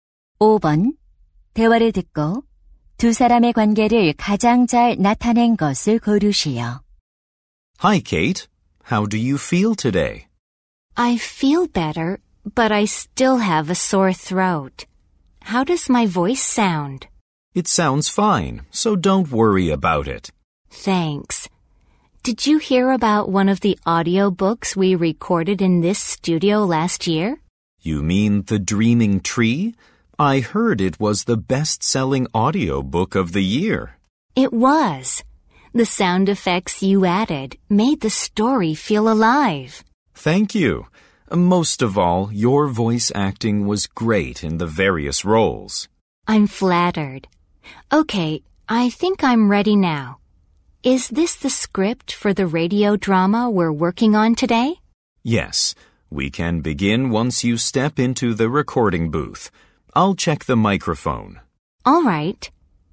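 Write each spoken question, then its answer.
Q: 대화를 듣고 두 사람의 관계를 가장 잘 나타낸 것을 고르시오.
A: 음향 기술자 - 성우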